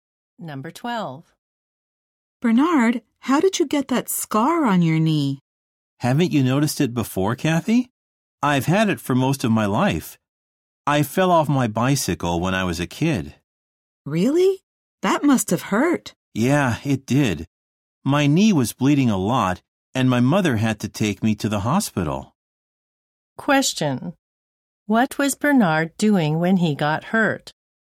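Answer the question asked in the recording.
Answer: Riding a bicycle.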